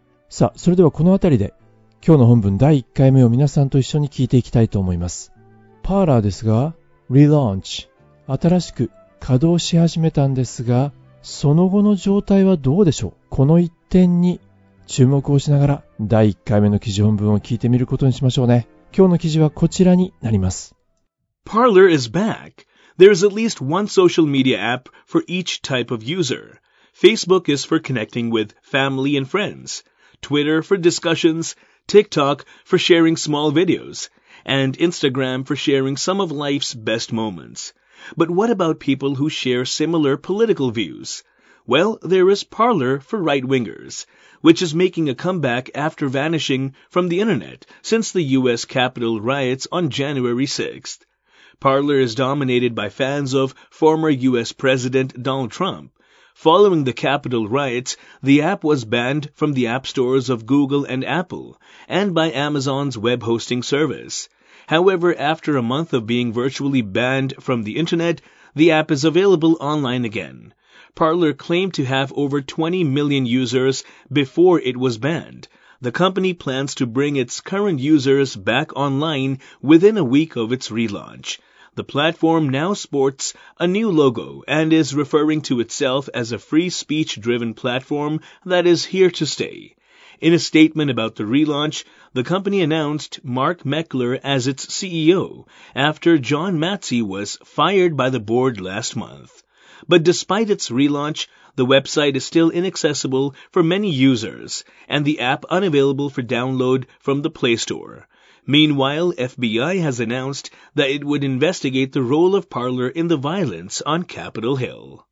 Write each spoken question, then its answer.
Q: パーラーですが、relaunch、新しく稼働し始めたんですが、その後の状態はどうでしょう?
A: But despite its relaunch, the website is still inaccessible for many users.